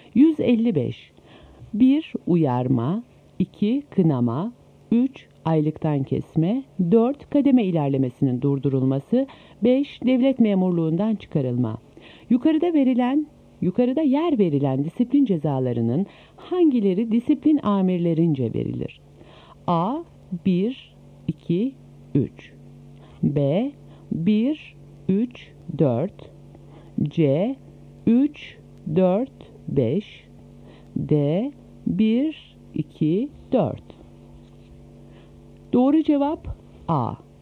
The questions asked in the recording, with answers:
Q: Yukarıda yer verilen disiplin cezalarının hangileri disiplin amirlerince verilir?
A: Doğru cevap A.